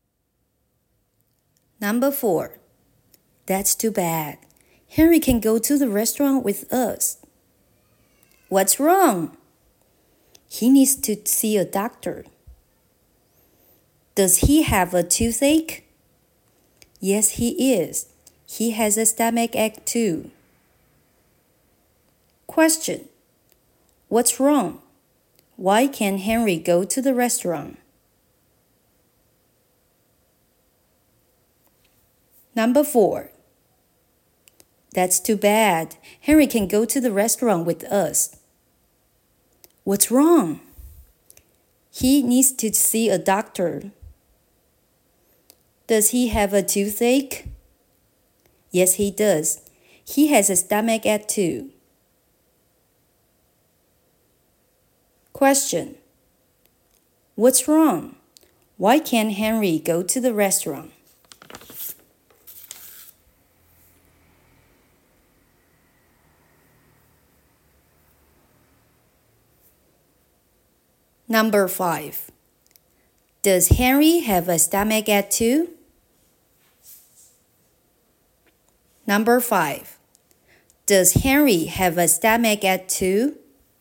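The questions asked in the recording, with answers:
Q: What's wrong? Why can't Henry go to the restaurant?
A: He has a toothache and a stomach ache; he needs to see a doctor.

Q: Does Henry have a stomach ache too?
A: Yes, he does.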